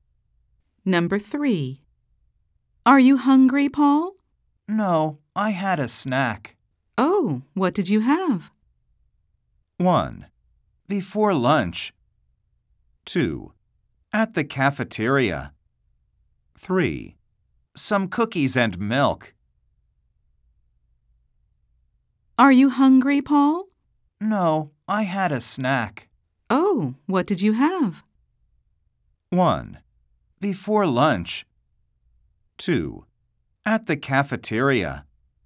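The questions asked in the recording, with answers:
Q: Oh, what did you have?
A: 3: Some cookies and milk.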